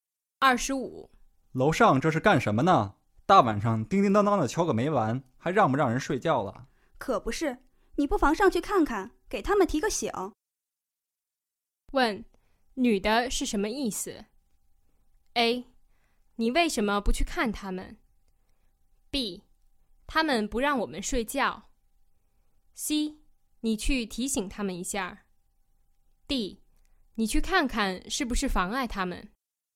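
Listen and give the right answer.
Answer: C: 你去提醒他们一下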